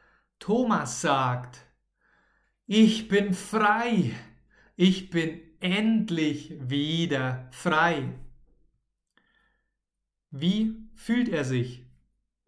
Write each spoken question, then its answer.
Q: Wie fühlt er sich?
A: Frei, Thomas fühlt sich frei.